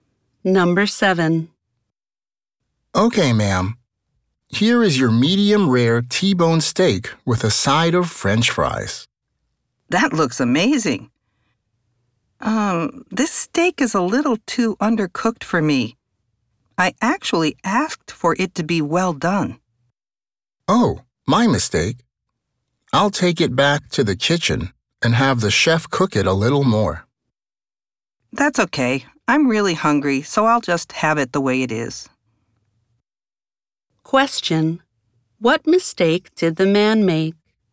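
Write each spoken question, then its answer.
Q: What mistake did the man make?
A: He brought her a medium rare steak when she had asked for it well done.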